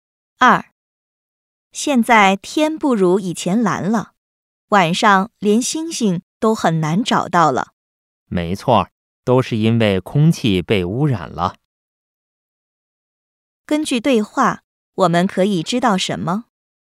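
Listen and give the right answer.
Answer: 空气被污染了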